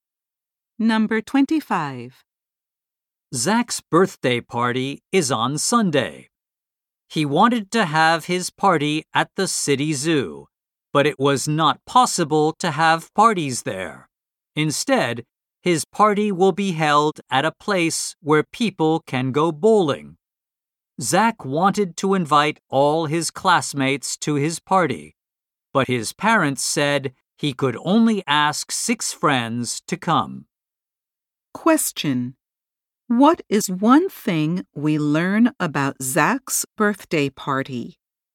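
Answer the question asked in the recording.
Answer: It will be held at a bowling place.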